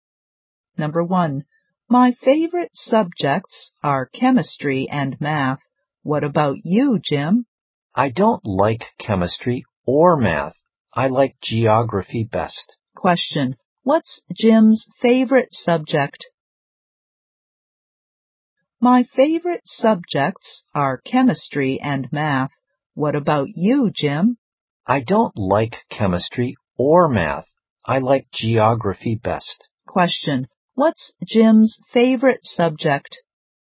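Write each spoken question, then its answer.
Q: what's Jim's favorite subject?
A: Geography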